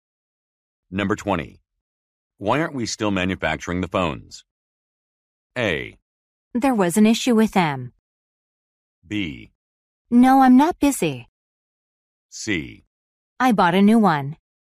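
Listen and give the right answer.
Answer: A: There was an issue with them.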